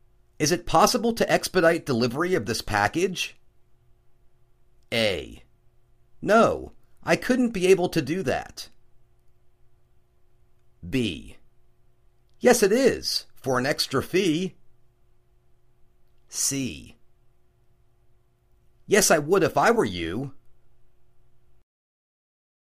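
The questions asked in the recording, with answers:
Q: Is it possible to expedite delivery of this package?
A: B: Yes, it is, for an extra fee.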